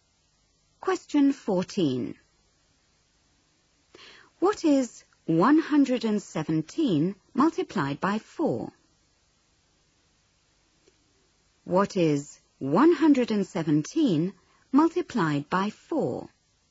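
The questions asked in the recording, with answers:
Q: What is 117 multiplied by 4?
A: 468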